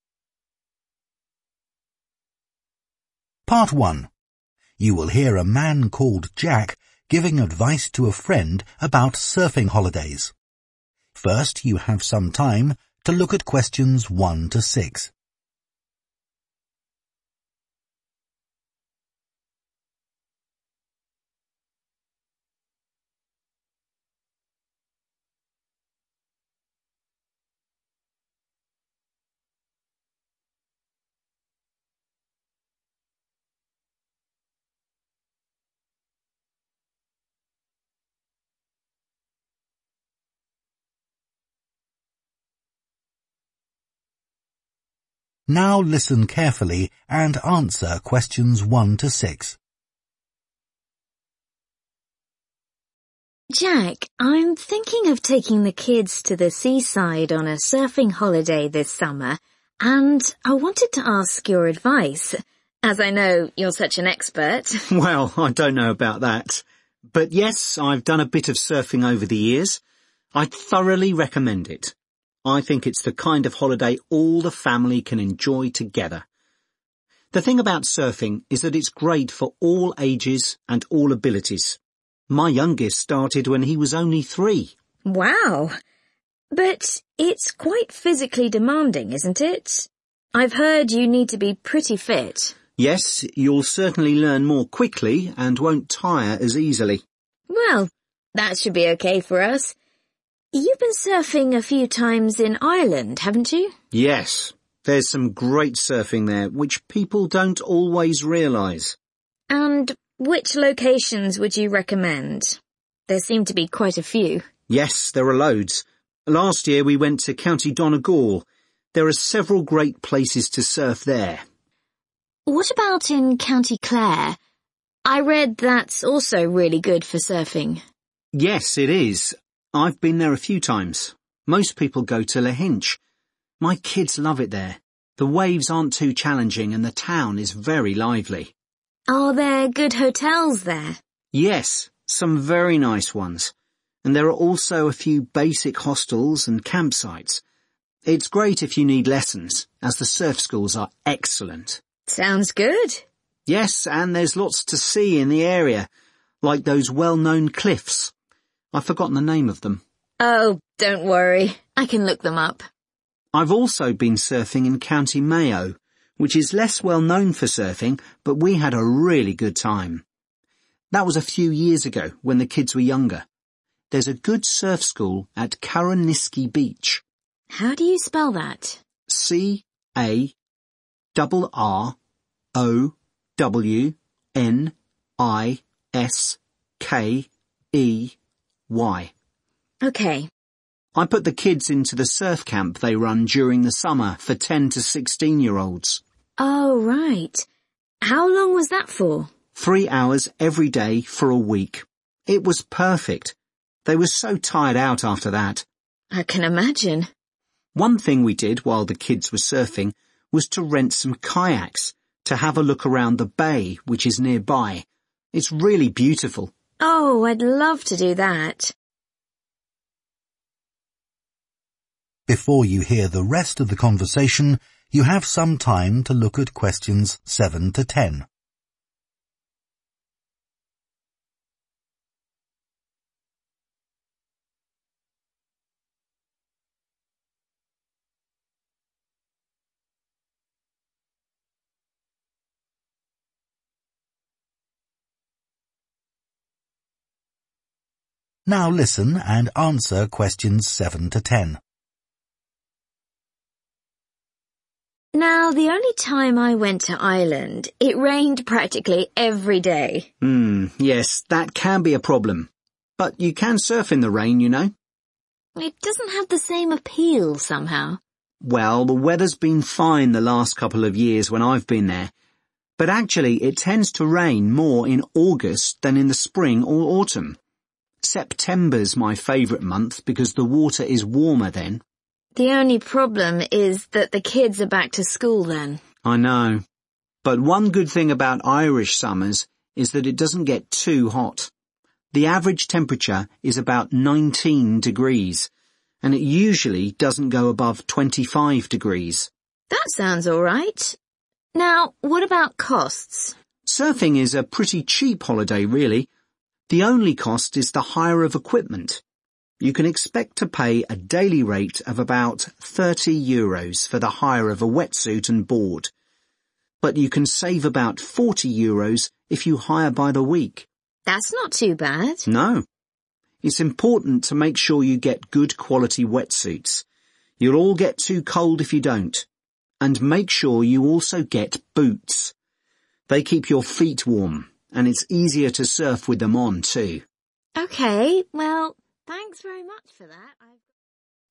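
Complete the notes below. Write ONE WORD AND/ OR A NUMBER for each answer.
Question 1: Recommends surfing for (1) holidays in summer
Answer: family

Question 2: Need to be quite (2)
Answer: fit

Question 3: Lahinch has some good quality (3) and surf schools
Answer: hotels

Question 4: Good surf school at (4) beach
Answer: Carrowniskey

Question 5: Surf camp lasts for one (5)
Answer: week

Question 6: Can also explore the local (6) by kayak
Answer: bay

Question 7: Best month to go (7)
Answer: September

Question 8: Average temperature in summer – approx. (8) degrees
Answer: 19

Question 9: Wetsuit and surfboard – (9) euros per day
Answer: 30

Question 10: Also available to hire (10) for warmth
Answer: boots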